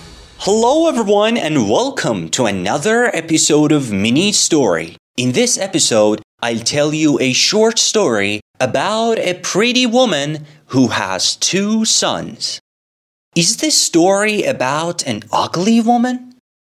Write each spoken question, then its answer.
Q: Is this story about an ugly woman?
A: No. This story is about a pretty woman.